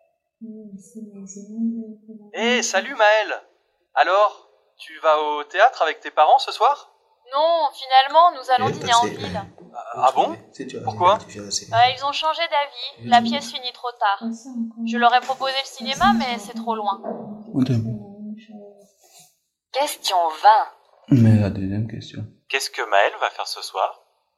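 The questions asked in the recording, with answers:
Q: Qu'est-ce que Maëlle va faire ce soir?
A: Dîner en ville avec ses parents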